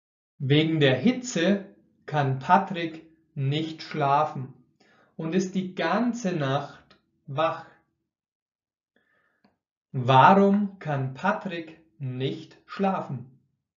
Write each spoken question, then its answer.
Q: Warum kann Patrick nicht schlafen?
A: Wegen der Hitze. Er kann wegen der Hitze nicht schlafen.